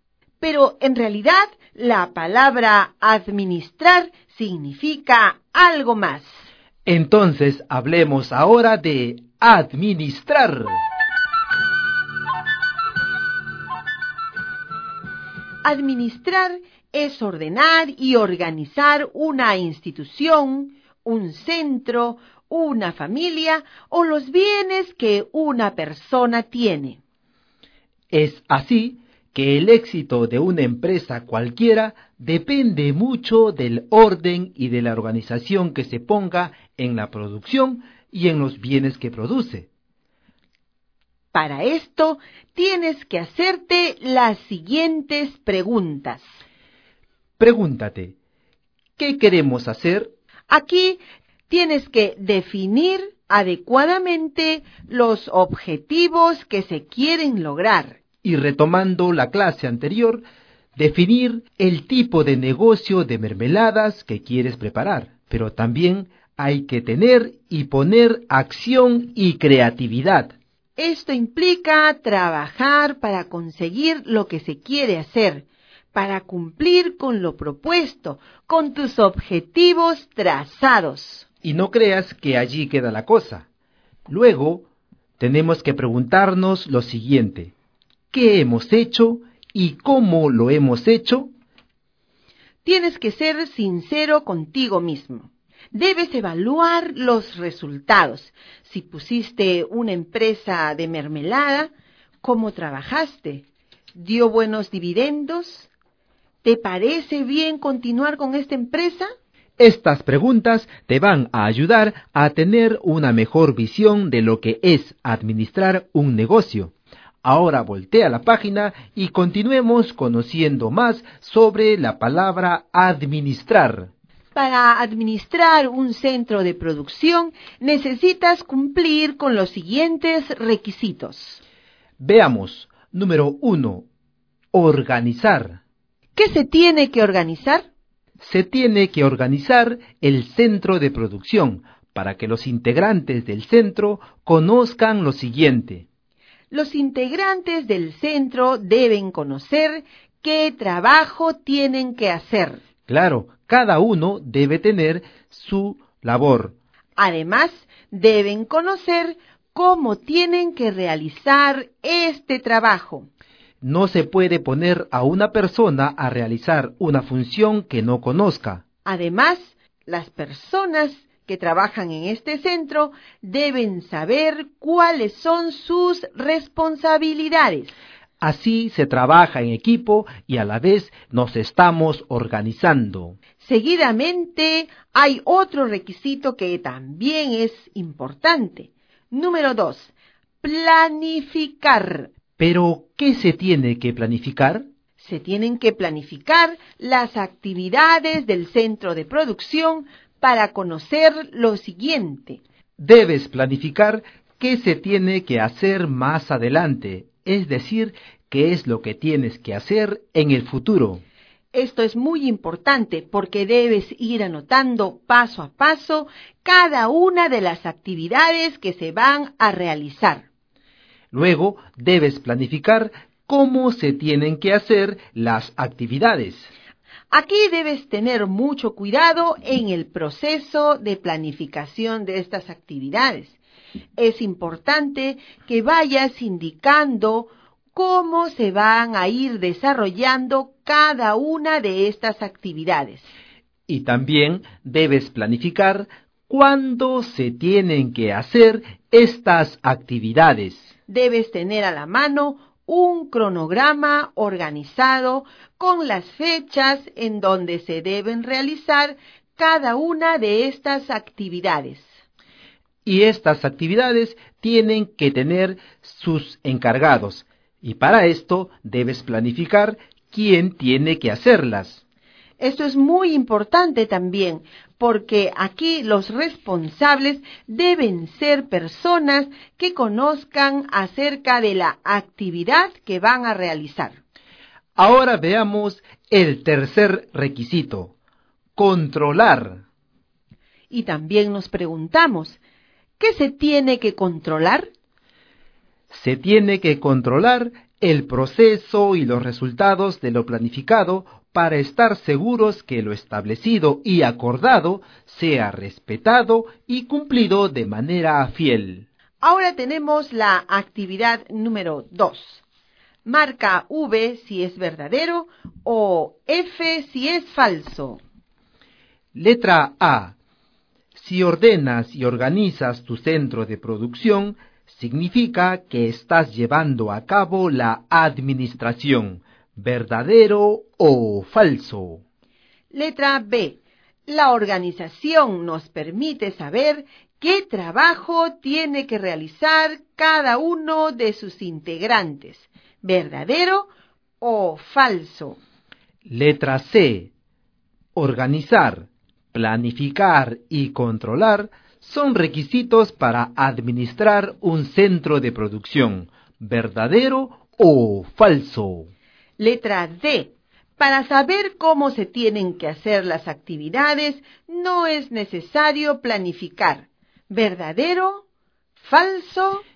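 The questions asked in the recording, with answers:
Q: Letra A. Si ordenas y organizas tu centro de producción, significa que estás llevando a cabo la administración. ¿Verdadero o falso?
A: Verdadero

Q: Letra B. La organización nos permite saber qué trabajo tiene que realizar cada uno de sus integrantes. ¿Verdadero o falso?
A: Verdadero

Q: Letra C. Organizar, planificar y controlar son requisitos para administrar un centro de producción. ¿Verdadero o falso?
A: Verdadero

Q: Letra D. Para saber cómo se tienen que hacer las actividades, no es necesario planificar. ¿Verdadero? ¿Falso?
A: Falso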